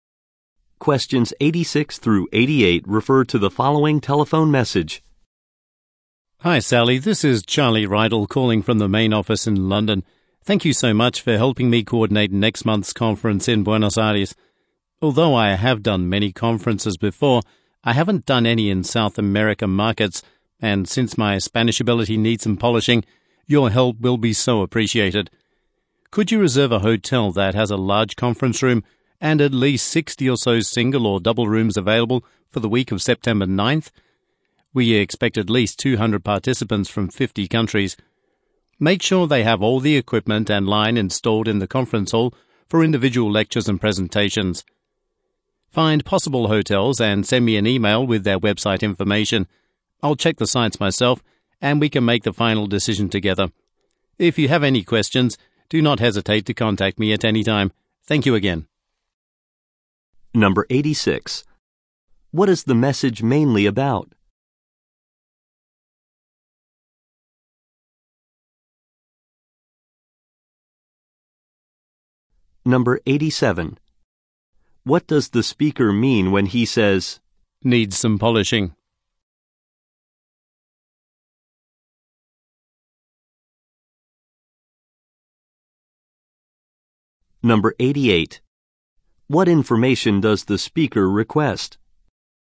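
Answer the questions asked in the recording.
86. Coordinating a conference in Buenos Aires
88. Possible hotels' website information by email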